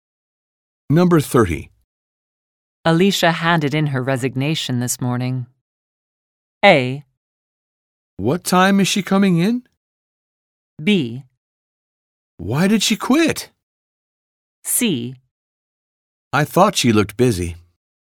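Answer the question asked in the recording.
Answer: B: Why did she quit?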